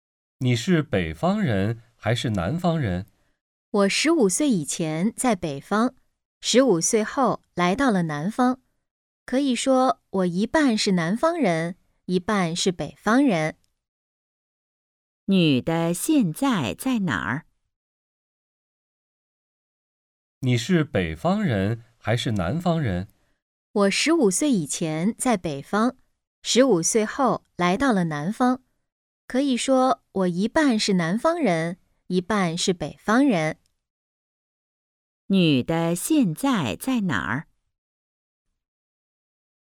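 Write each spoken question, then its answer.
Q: 女的现在在哪儿?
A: 南方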